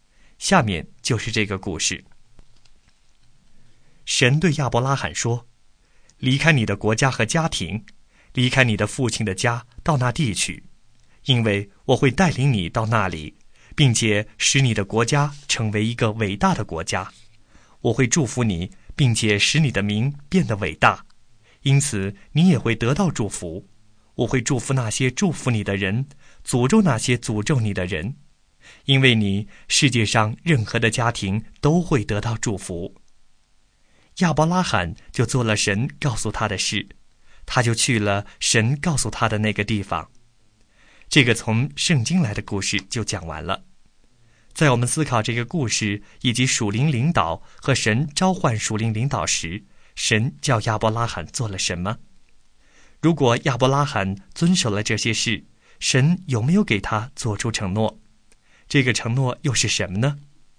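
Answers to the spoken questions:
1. 离开他的国家、家庭和父亲的家,到神要带领他去的地方
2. 有;神会使他成为伟大的国家,祝福他,使他的名为大,并且因为他,世上所有的家庭都会得到祝福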